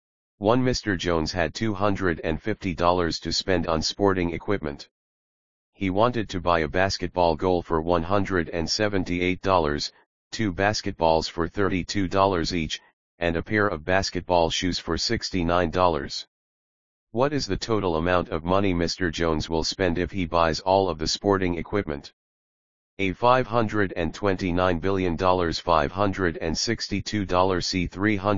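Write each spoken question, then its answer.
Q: What is the total amount of money Mr. Jones will spend if he buys all of the sporting equipment?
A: C: $311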